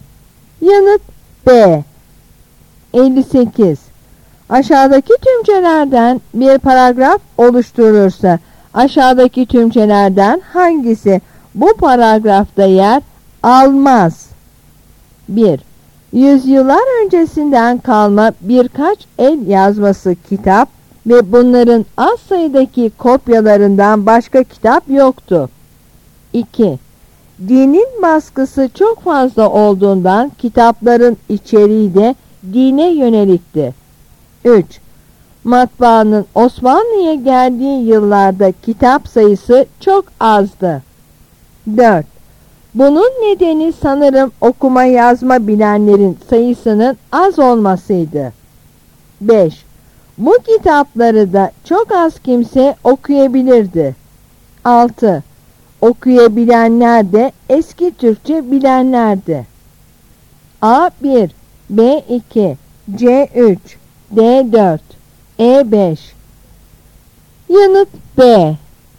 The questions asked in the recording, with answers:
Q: Aşağıdaki tümcelerden bir paragraf oluşturulursa, aşağıdaki tümcelerden hangisi bu paragrafta yer almaz?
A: Yanıt B.